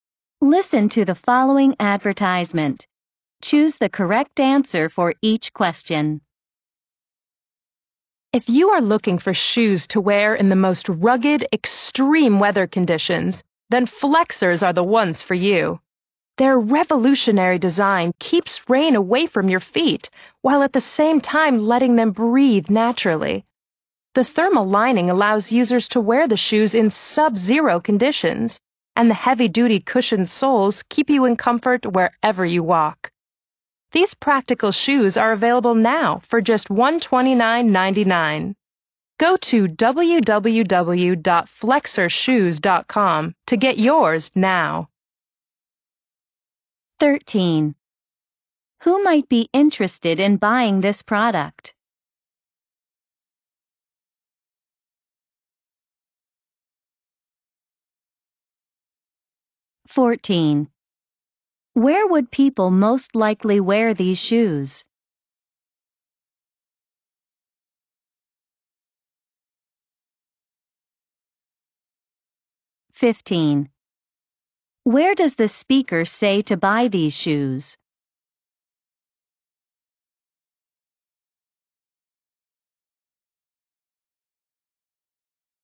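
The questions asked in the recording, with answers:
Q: Where does the speaker say to buy these shoes?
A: Online at www.flexershoes.com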